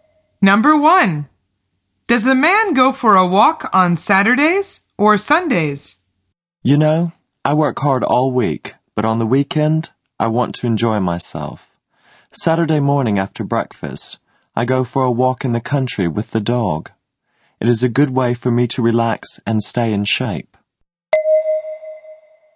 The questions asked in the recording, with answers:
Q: Does the man go for a walk on Saturdays or Sundays?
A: The answer is Saturday.